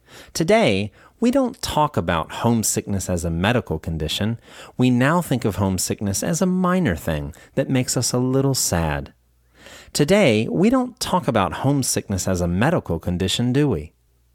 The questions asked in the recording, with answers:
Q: Today, we don't talk about homesickness as a medical condition, do we?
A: No, we don't. We don't talk about homesickness as a medical condition.